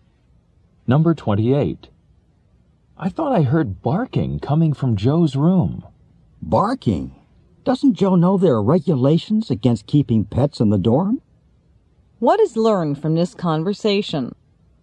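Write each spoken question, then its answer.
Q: What is learned from this conversation?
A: Pets aren't allowed in the dorm.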